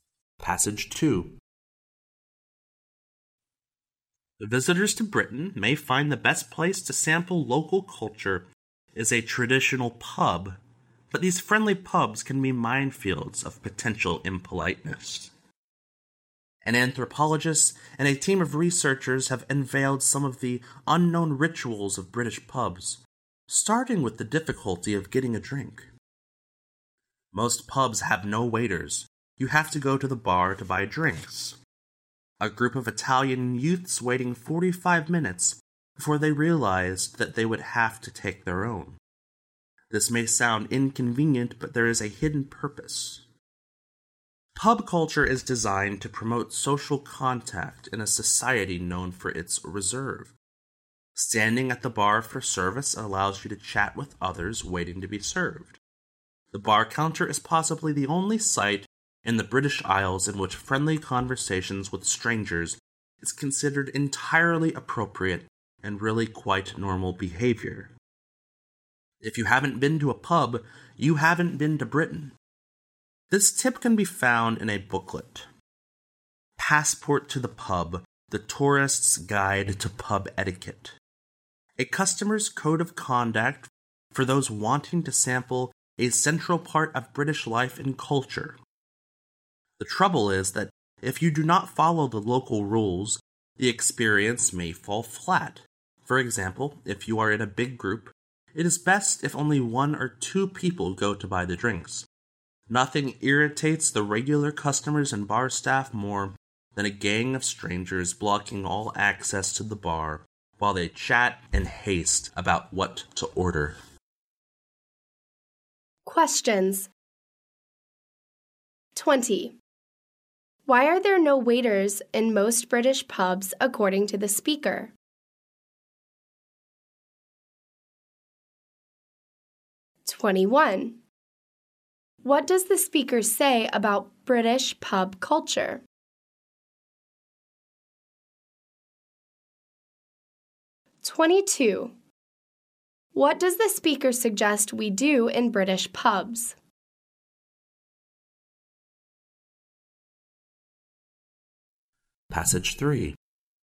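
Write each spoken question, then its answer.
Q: Why are there no waiters in most British pubs according to the speaker?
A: To promote social contact

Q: What does the speaker suggest we do in British pubs?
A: In a big group, let only one or two people go to buy the drinks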